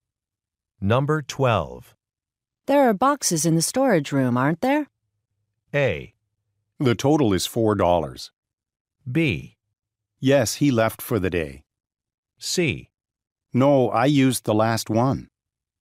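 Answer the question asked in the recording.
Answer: C: No, I used the last one.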